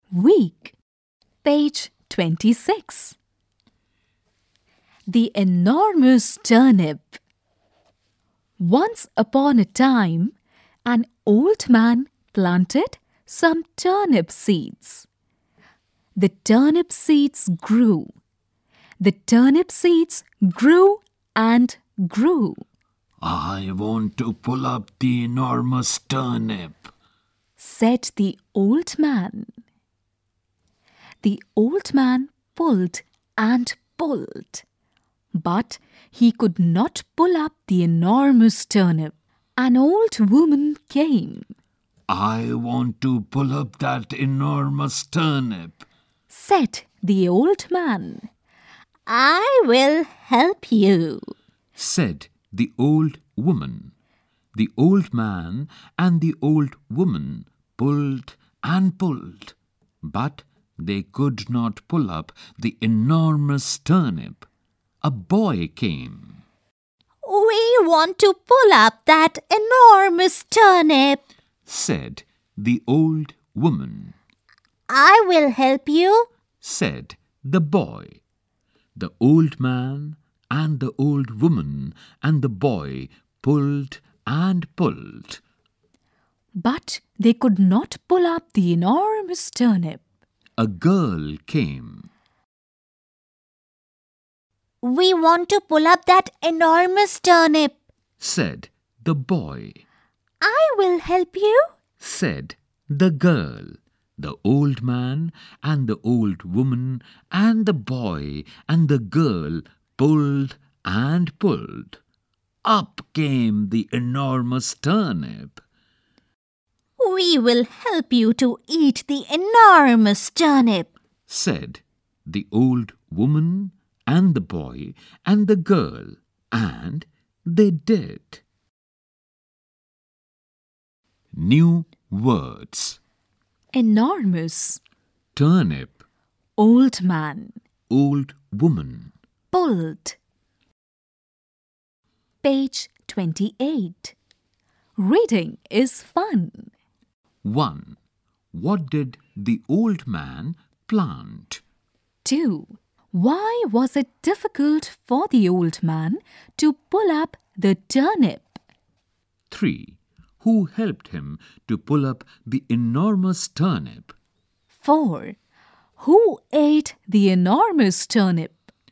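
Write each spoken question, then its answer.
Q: What did the old man plant?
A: Some turnip seeds

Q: Why was it difficult for the old man to pull up the turnip?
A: Because the turnip was enormous

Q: Who helped him to pull up the enormous turnip?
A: The old woman, the boy and the girl

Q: Who ate the enormous turnip?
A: The old man, the old woman, the boy and the girl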